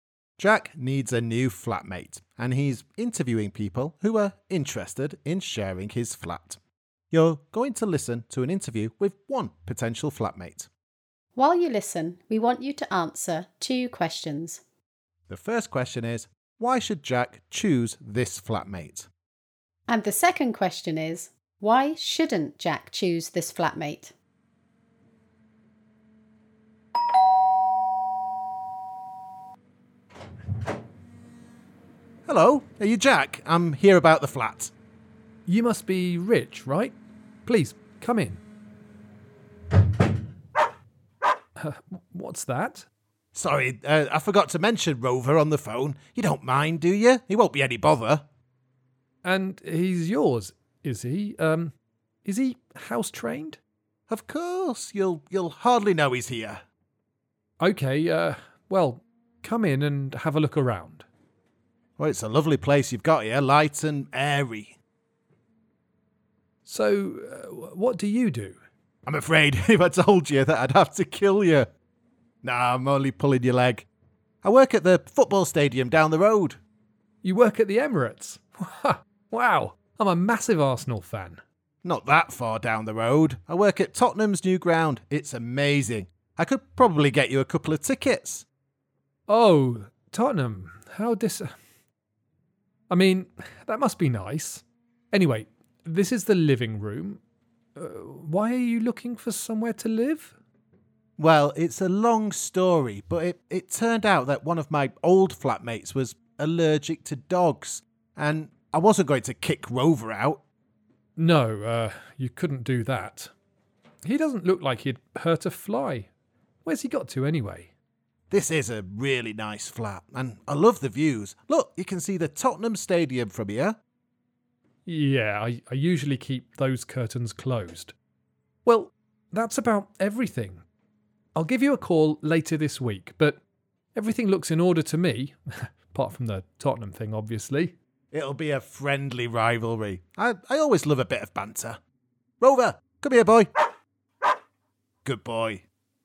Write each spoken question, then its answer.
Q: The first question is, why should Jack choose this flatmate?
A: I suppose the biggest plus is that he likes football, so it wouldn't be a problem if the football was on the TV all the time.

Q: And the second question is, why shouldn't Jack choose this flatmate?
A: Well, there's the Tottenham thing, but I was also a bit unsure about the dog.